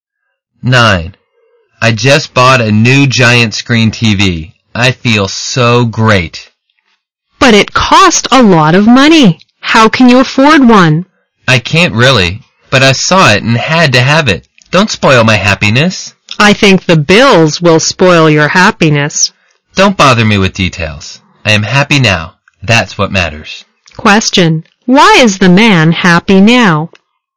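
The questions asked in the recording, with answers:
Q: Why is the man happy now?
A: He just bought a new giant screen TV.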